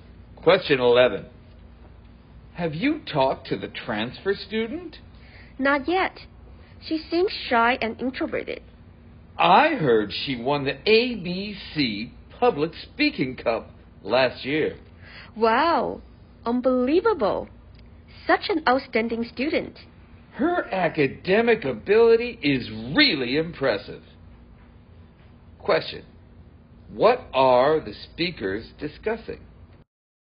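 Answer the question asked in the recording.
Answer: The new transfer student and her impressive abilities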